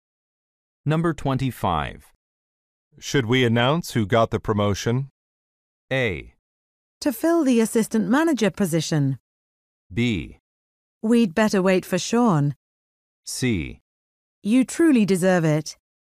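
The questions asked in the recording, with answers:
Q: Should we announce who got the promotion?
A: B: We'd better wait for Sean.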